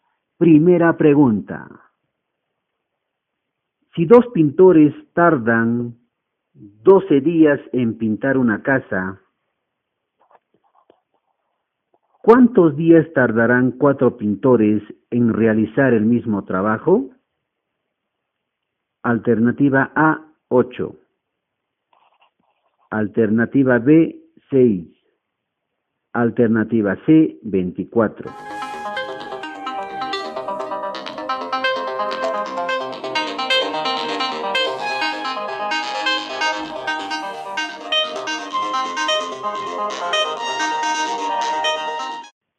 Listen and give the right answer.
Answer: La respuesta correcta es la alternativa B, 6.